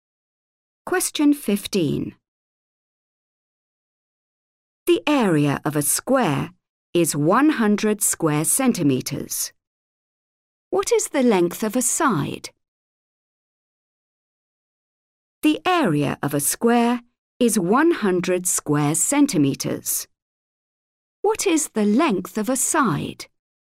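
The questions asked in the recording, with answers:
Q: What is the length of a side?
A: 10 centimetres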